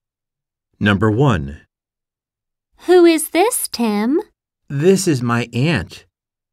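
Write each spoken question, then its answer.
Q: Who is this, Tim?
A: my aunt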